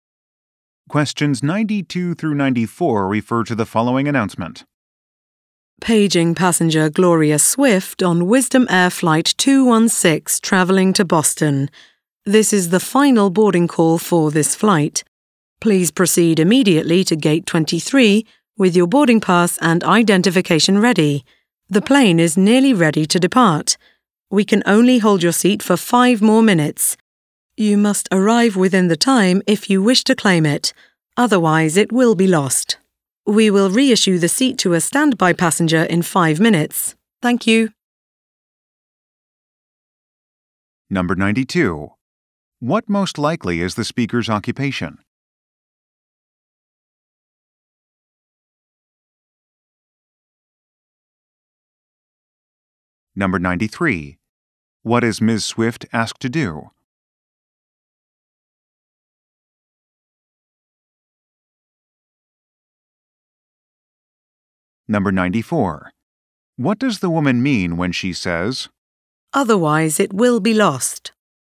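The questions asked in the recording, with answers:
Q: What most likely is the speaker's occupation?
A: Airline gate agent

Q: What is Ms. Swift asked to do?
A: Go to Gate 23 immediately

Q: What does the woman mean when she says, "Otherwise it will be lost"?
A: Her seat will be given to a standby passenger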